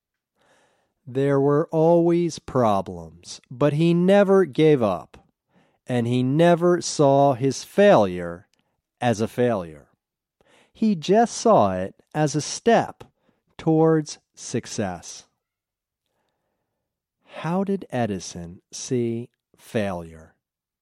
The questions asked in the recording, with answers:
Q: How did Edison see failure?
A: He saw failure as a step towards success.